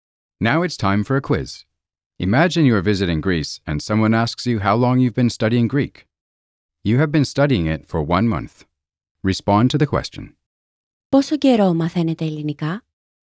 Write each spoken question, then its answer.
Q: Πόσο καιρό μαθαίνετε ελληνικά?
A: Για έναν μήνα.